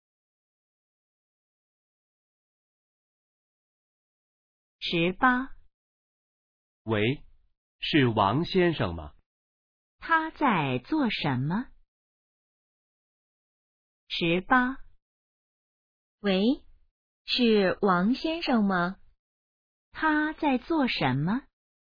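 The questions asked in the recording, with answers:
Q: 他在做什么?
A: 打电话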